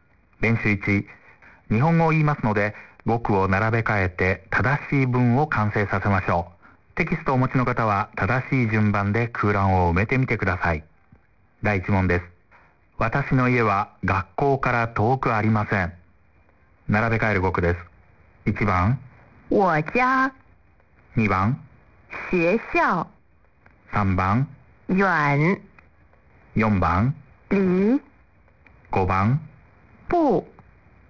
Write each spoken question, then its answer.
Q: 第1問です。私の家は学校から遠くありません。並べ替える語句です。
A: 1、4、2、5、3の順でした。